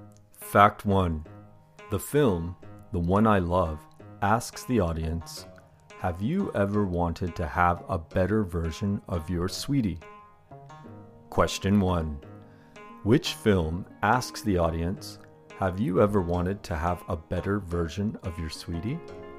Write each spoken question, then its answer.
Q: Which film asks the audience Have you ever wanted to have a better version of your sweetie?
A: The film, The One I Love, asks the audience Have you ever wanted to have a better version of your sweetie?